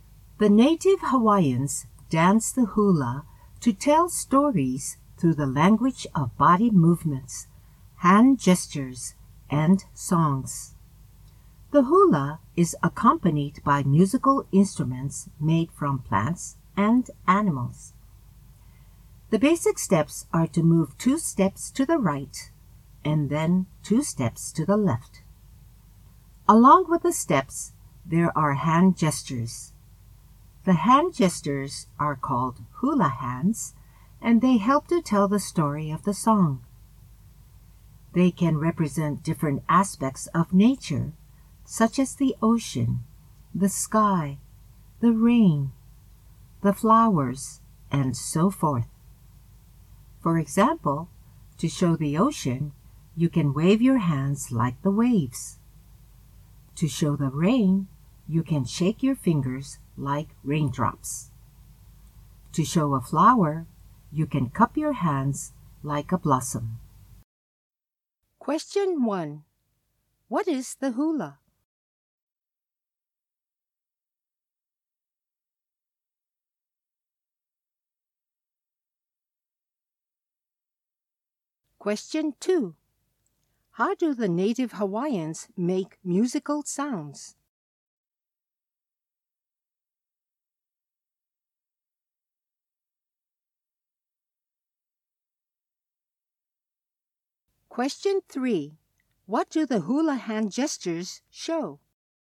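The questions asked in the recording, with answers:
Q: What is the hula?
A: A native Hawaiian dance that tells stories

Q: How do the native Hawaiians make musical sounds?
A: With instruments made from plants and animals

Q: What do the hula hand gestures show?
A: Different aspects of nature, such as the ocean, the sky, the rain and the flowers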